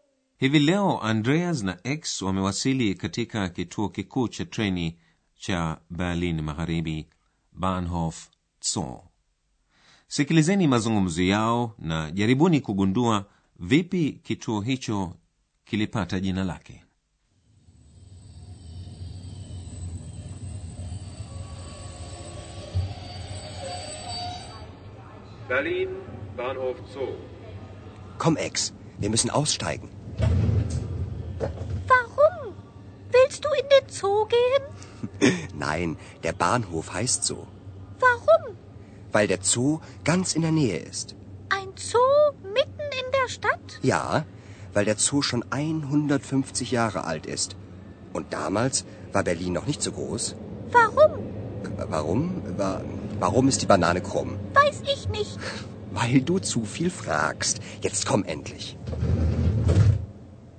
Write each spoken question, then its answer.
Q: jaribuni kugundua vipi kituo hicho kilipata jina lake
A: Kituo cha treni kinaitwa Bahnhof Zoo kwa sababu kiko karibu sana na bustani ya wanyama.